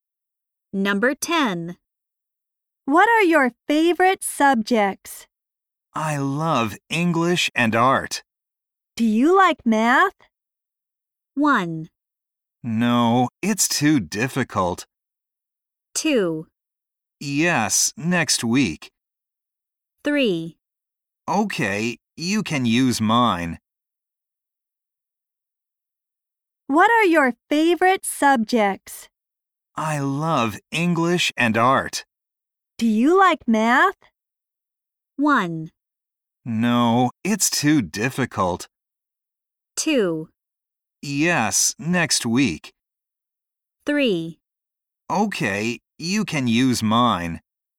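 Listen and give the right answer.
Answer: 1: No, it's too difficult.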